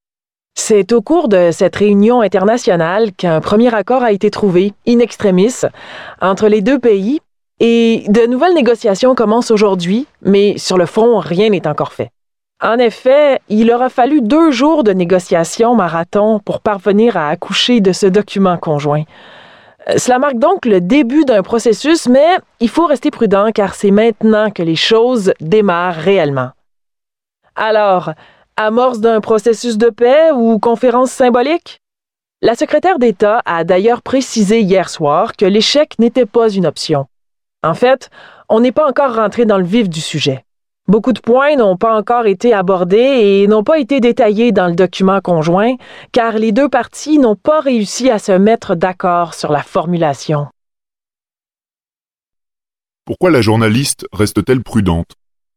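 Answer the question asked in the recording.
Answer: Parce que les vraies négociations commencent seulement : beaucoup de points n'ont pas encore été abordés ni détaillés, faute d'accord sur la formulation.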